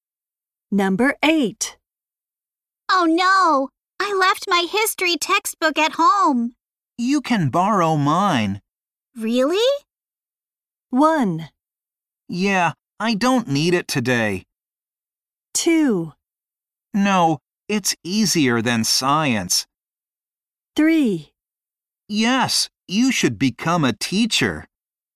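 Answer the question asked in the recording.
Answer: 1: Yeah, I don't need it today.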